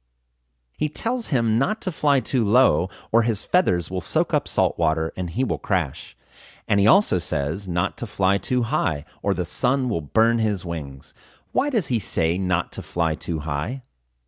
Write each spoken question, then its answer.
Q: Why does he say not to fly too high?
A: He says not to fly too high or the sun will burn his wings.